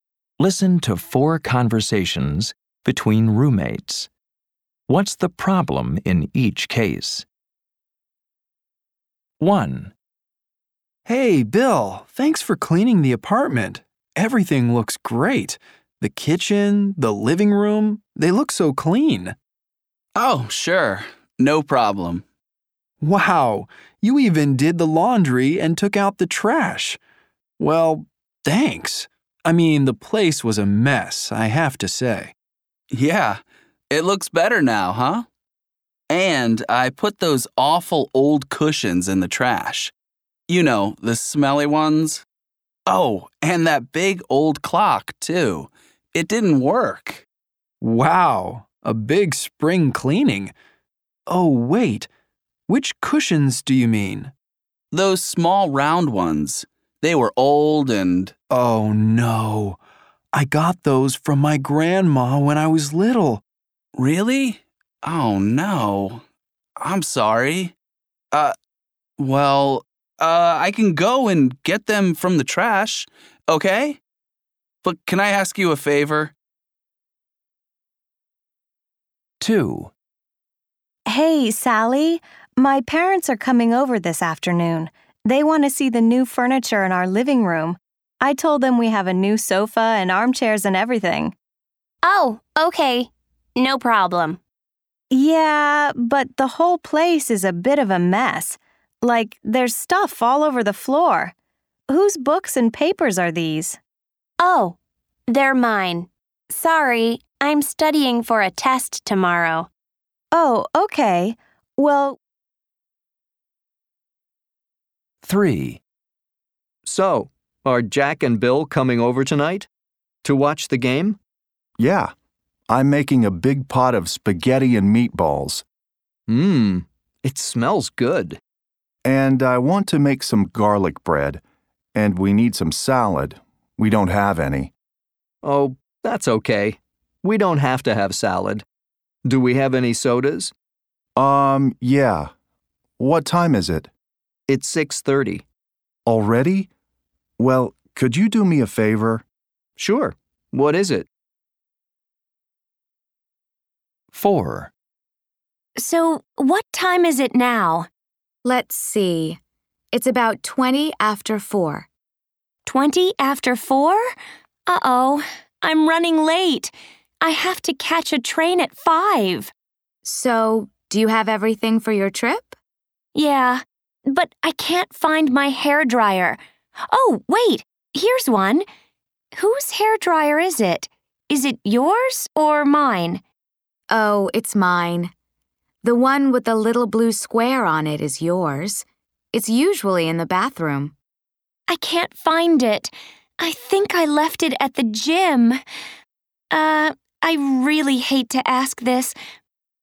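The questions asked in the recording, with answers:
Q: What's the problem in each case?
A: Bill threw away the cushions his roommate got from his grandma as a child.

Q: What's the problem in each case?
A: Her parents are coming, but Sally's books and papers are all over the floor.

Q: What's the problem in each case?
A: She is late for her train and can't find her hairdryer. She thinks she left it at the gym.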